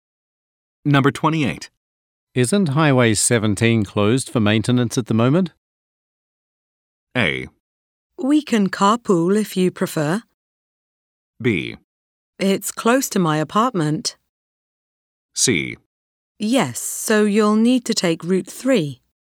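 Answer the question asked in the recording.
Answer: C: Yes, so you'll need to take Route 3.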